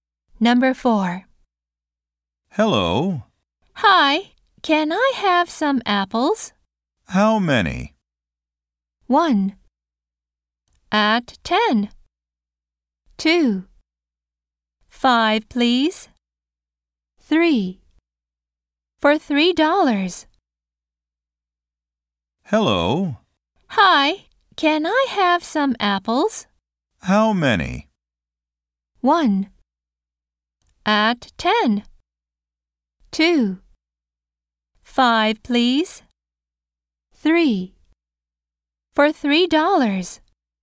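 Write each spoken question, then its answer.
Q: How many?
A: 2: 5, please.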